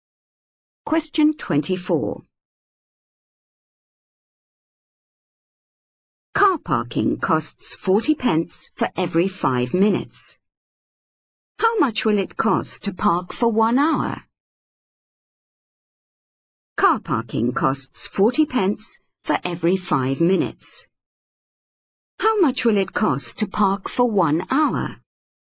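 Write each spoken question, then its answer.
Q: How much will it cost to park for 1 hour?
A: £4.80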